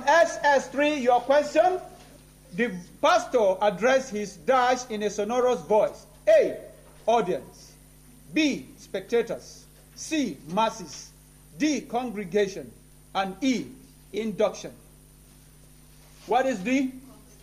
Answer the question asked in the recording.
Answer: Congregation.